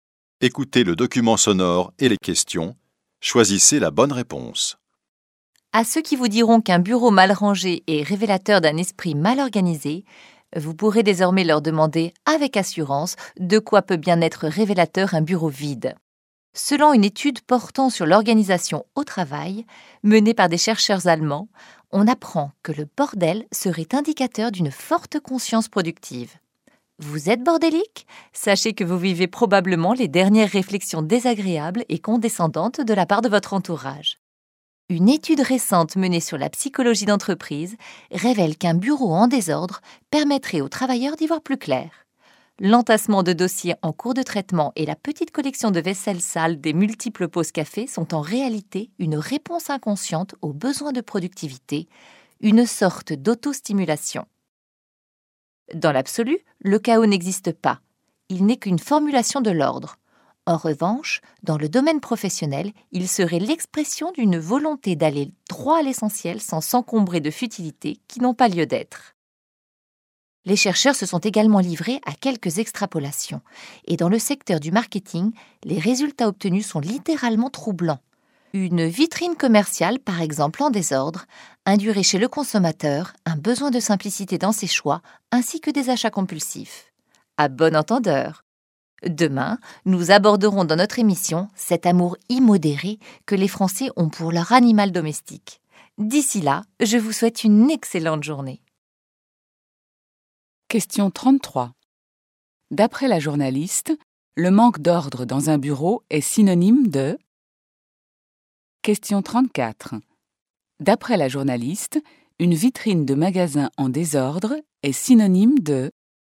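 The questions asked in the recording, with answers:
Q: D'après la journaliste, le manque d'ordre dans un bureau est synonyme de...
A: une forte conscience productive (productivité)

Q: D'après la journaliste, une vitrine de magasin en désordre est synonyme de...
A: besoin de simplicité dans les choix et achats compulsifs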